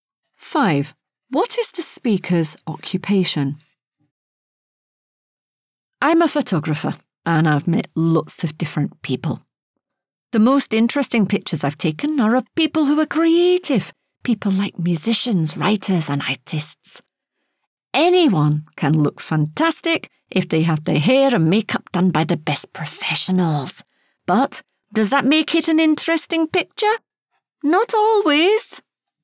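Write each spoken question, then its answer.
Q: What is the speaker's occupation?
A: photographer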